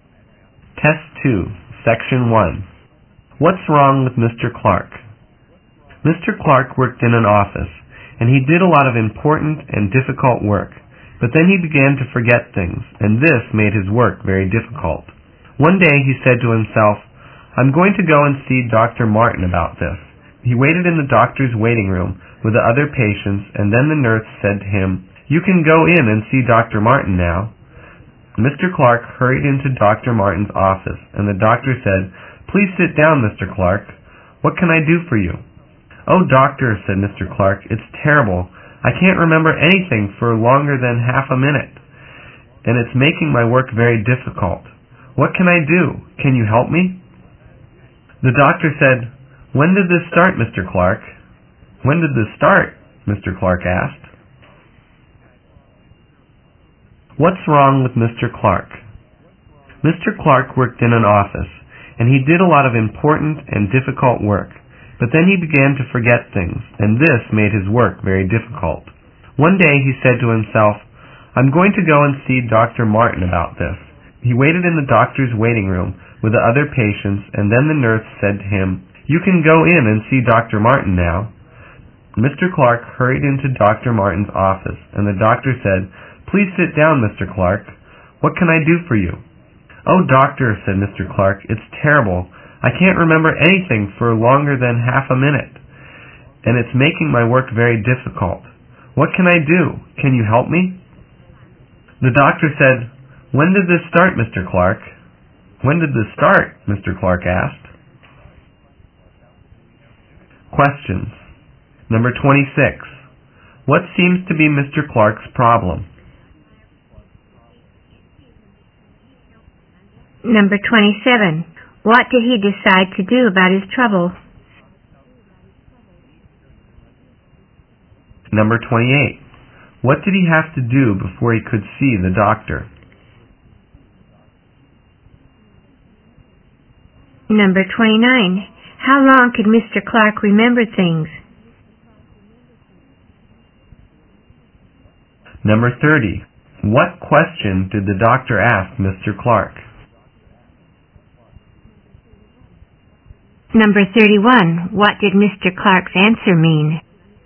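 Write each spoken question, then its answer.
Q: What seems to be Mr. Clark's problem?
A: He forgets things very quickly

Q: What did he decide to do about his trouble?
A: Go and see Dr. Martin

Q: What did he have to do before he could see the doctor?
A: Wait in the waiting room

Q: How long could Mr. Clark remember things?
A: No longer than half a minute

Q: What question did the doctor ask Mr. Clark?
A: When did this start?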